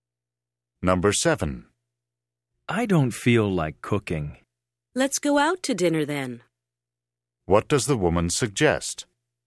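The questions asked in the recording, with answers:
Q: What does the woman suggest?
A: Going out to dinner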